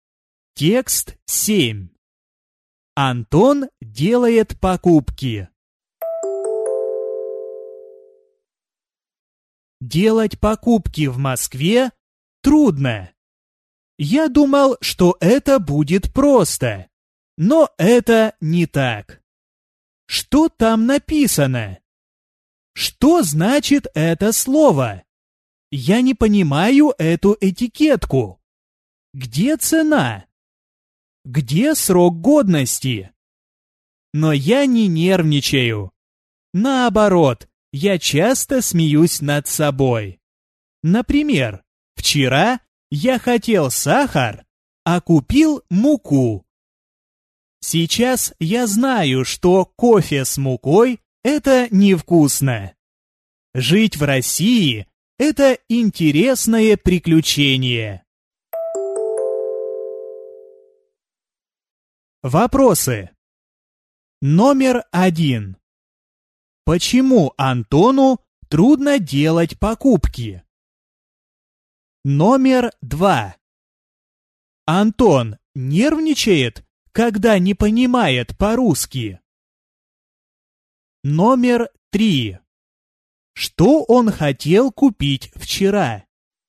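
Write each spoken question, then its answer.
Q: Почему Антону трудно делать покупки?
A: Он не понимает, что написано на этикетках

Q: Антон нервничает, когда не понимает по-русски?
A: Нет, он часто смеётся над собой

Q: Что он хотел купить вчера?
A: Сахар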